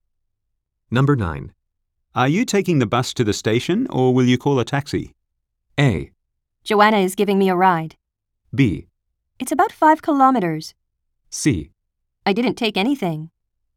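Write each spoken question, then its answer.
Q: Are you taking the bus to the station or will you call a taxi?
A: A: Joanna is giving me a ride.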